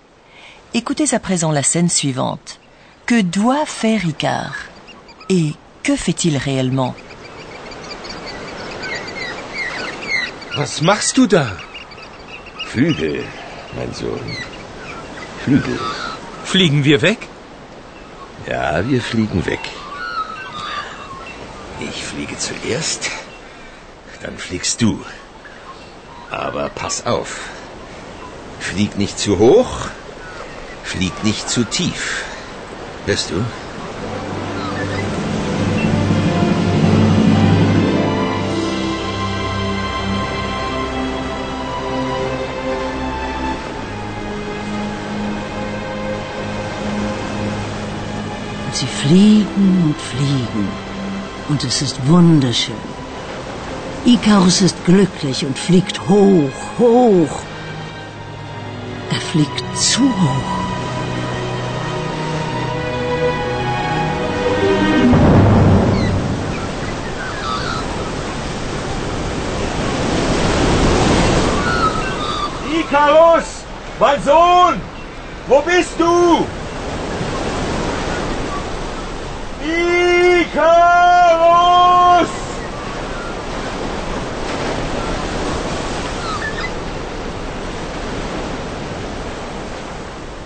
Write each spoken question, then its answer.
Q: Que doit faire Icar?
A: Et pour être sûr qu'Icar fasse correctement les choses, son père lui précise qu'il ne doit pas voler trop haut.